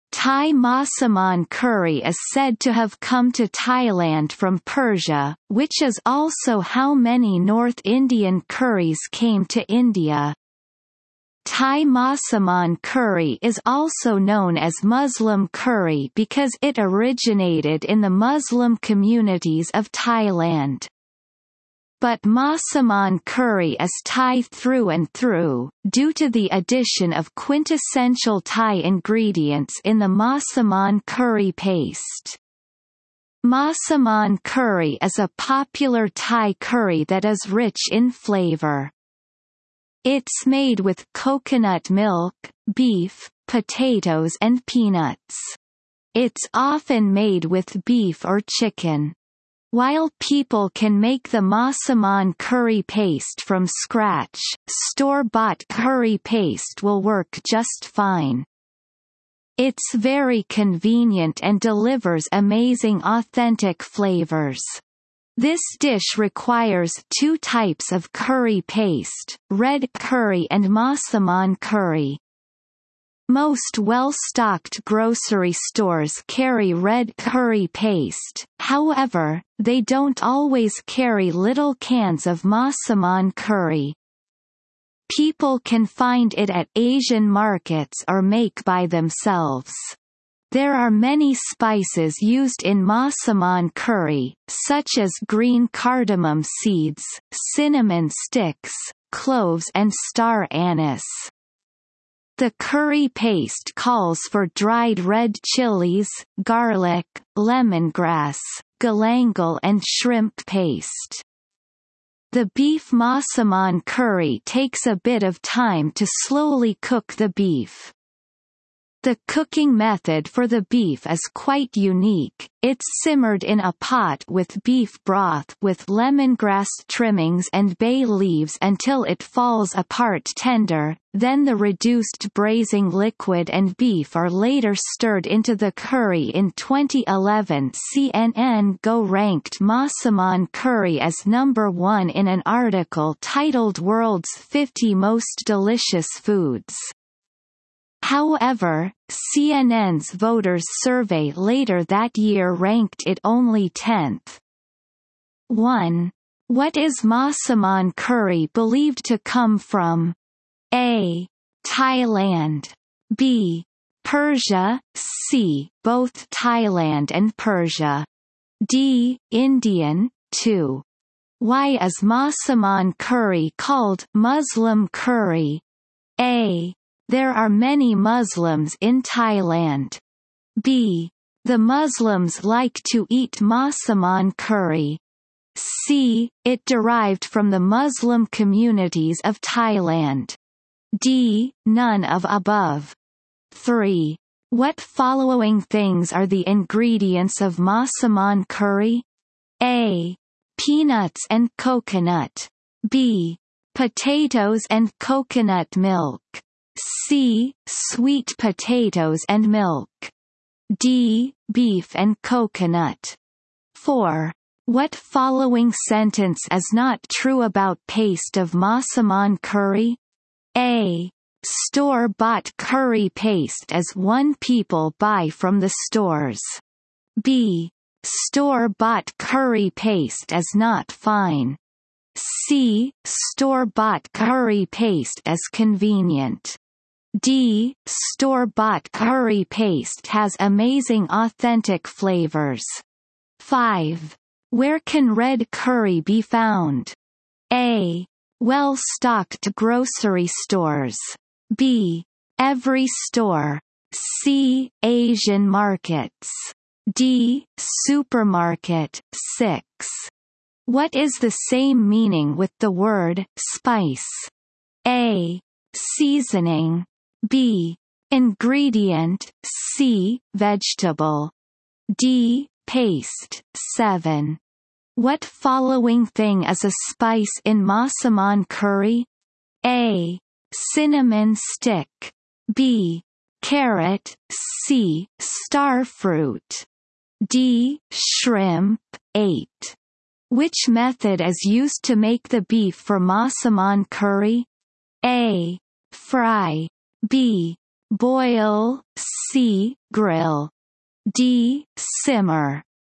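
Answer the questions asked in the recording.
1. B: Persia
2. C: It derived from the Muslim communities of Thailand.
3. B: Potatoes and coconut milk.
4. B: Store-bought curry paste is not fine.
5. A: Well-stocked grocery stores.
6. A: Seasoning.
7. A: Cinnamon stick.
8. D: simmer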